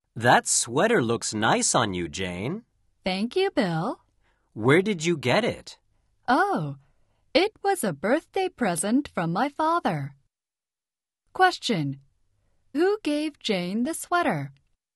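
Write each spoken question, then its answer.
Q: Who gave Jane the sweater?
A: Her father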